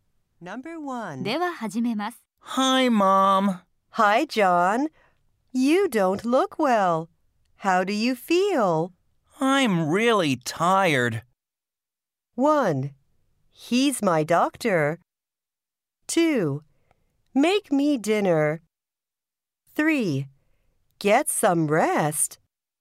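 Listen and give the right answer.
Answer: 3: Get some rest.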